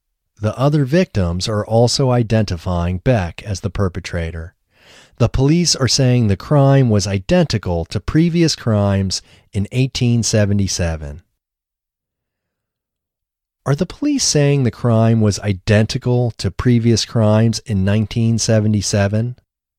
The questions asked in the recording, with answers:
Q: Are the police saying the crime was identical to previous crimes in 1977?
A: No, the police aren't saying the crime was identical to previous crimes in 1977.